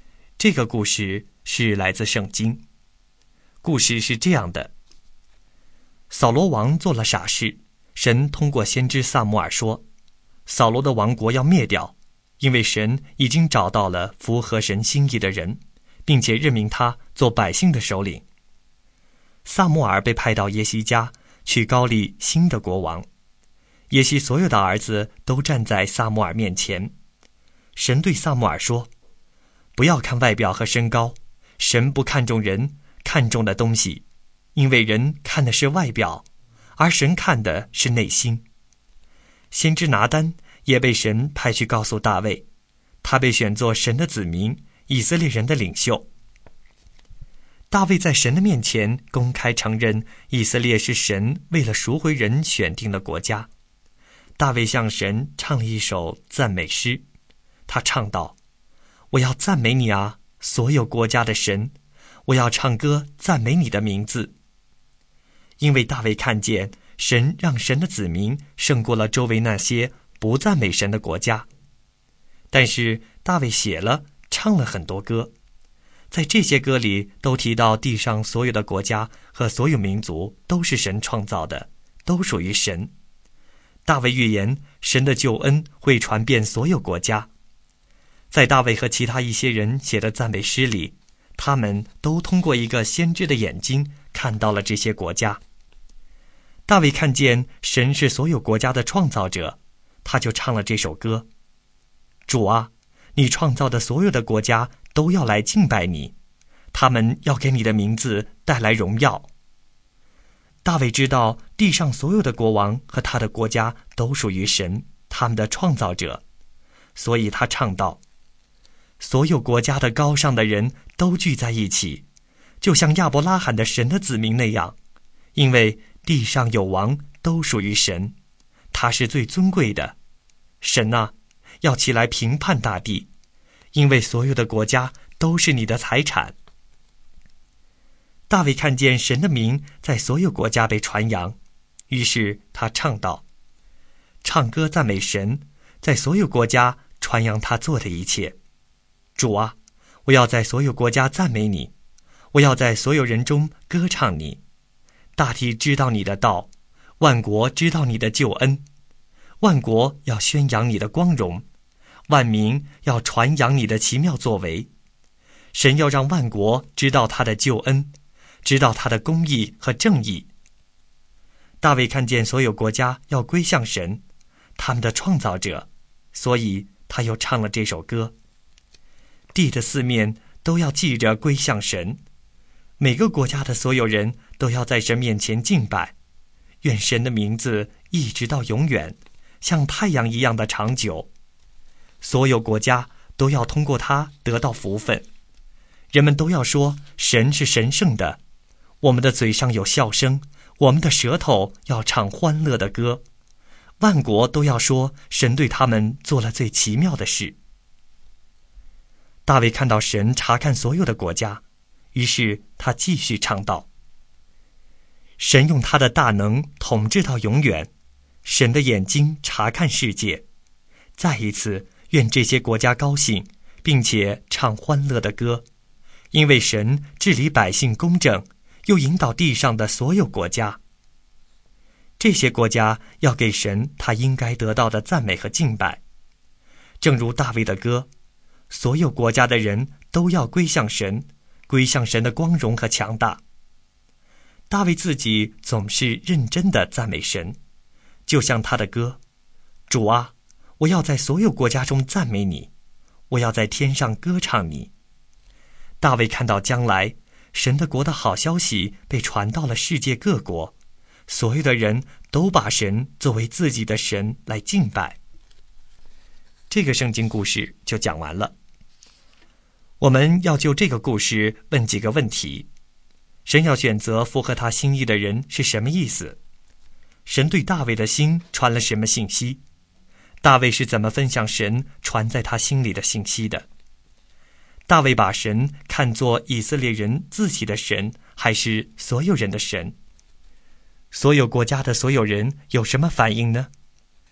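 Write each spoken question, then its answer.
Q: 大卫把神看作以色列人自己的神,还是所有人的神?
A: 所有人的神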